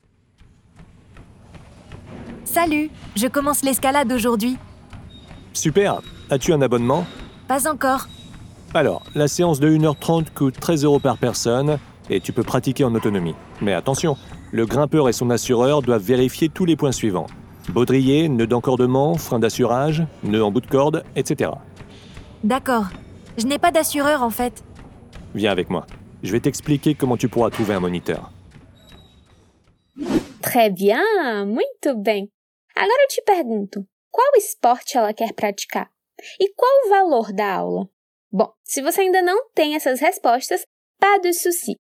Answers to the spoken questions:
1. Hoje ela começa a praticar a escalada.
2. Uma hora e meia custa 13 euros.